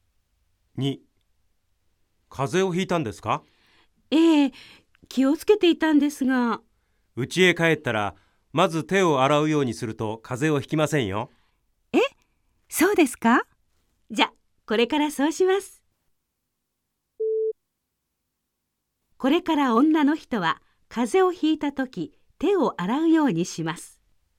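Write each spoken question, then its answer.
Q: これから女の人は風邪をひいたとき手を洗うようにします。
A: ×(正しくない)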